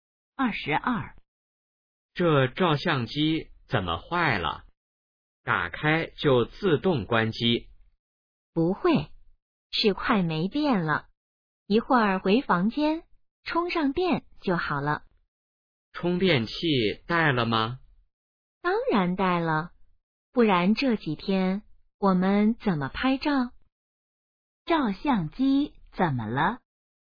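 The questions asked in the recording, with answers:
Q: 照相机怎么了?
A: 快没电了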